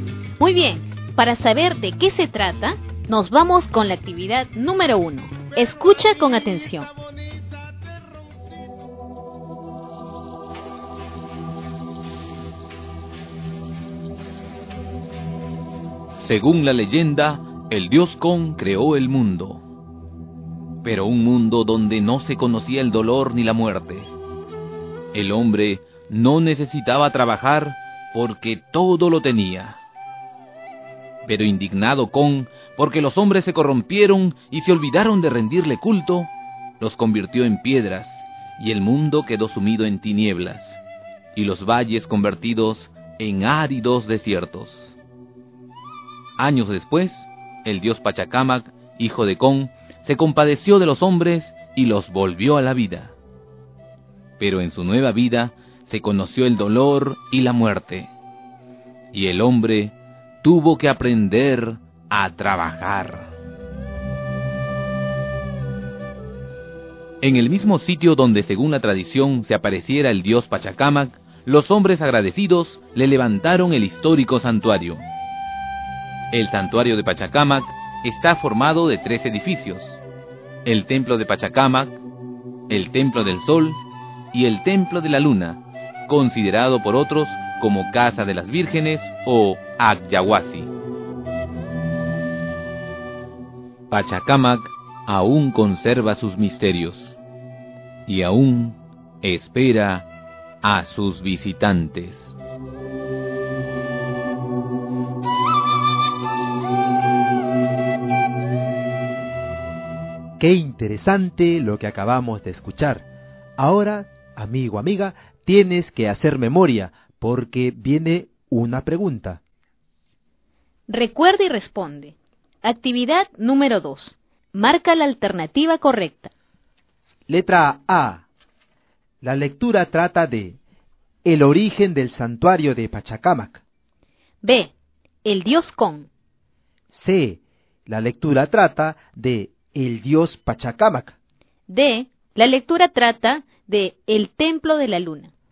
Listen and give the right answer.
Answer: la alternativa A, el origen del santuario de Pachacamac.